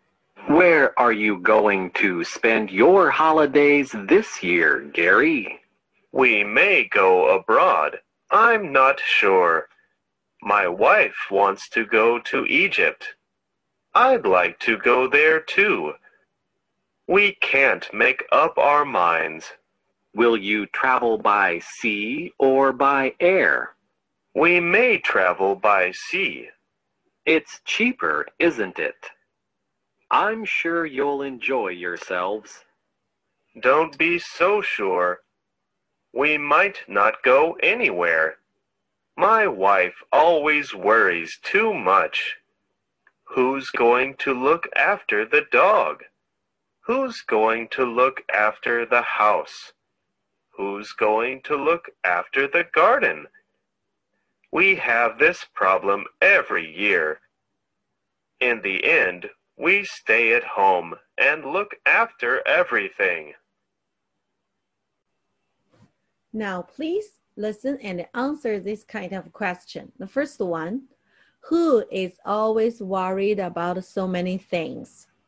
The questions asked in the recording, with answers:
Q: who is always worried about so many things?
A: Gary's wife.